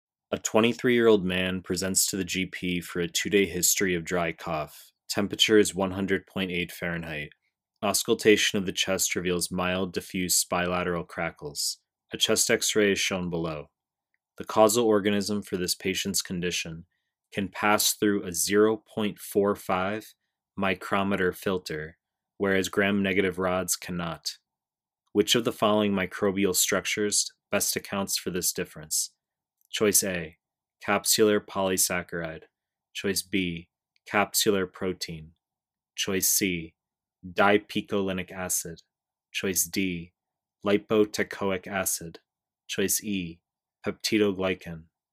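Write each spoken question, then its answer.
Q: Which of the following microbial structures best accounts for this difference?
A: E: peptidoglycan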